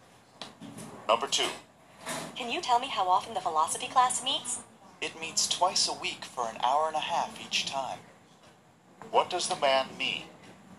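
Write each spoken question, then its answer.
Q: What does the man mean?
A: The class meets two times a week for 90 minutes each time.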